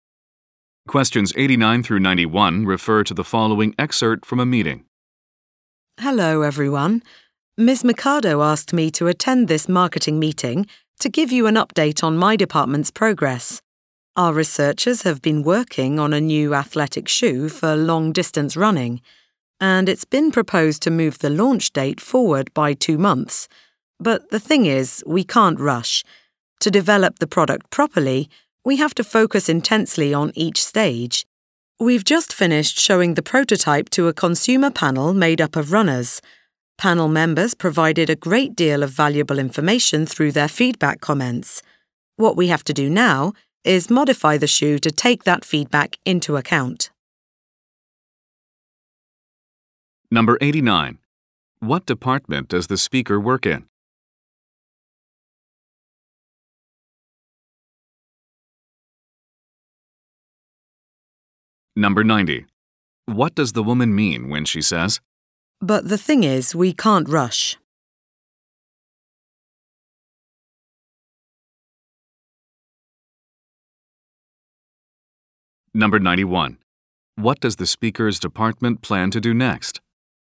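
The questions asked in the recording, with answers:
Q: What department does the speaker work in?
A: Research and development

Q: What does the speaker's department plan to do next?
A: Modify the shoe based on feedback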